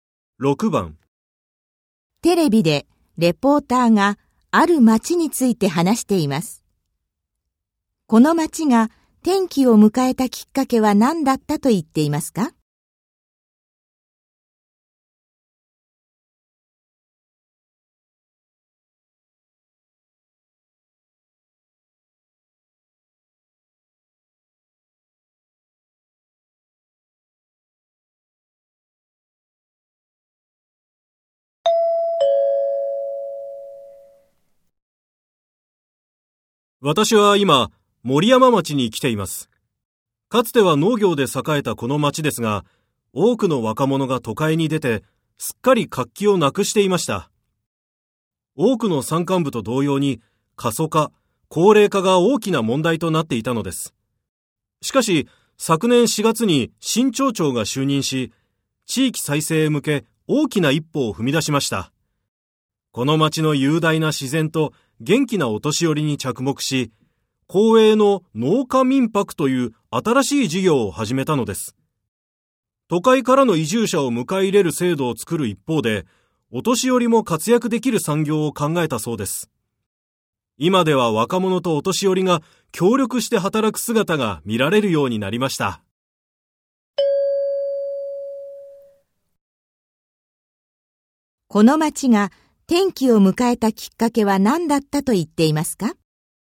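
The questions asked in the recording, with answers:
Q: この町が転機を迎えたきっかけは何だったと言っていますか?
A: 新しい町長が就任したこと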